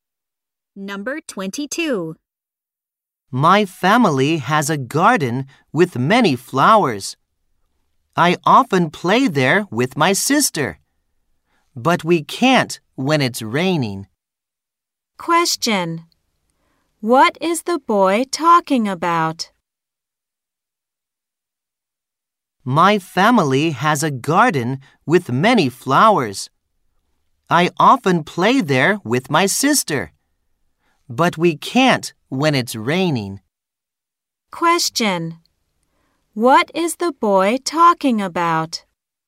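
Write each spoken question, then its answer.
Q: Question. What is the boy talking about?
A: His family's garden.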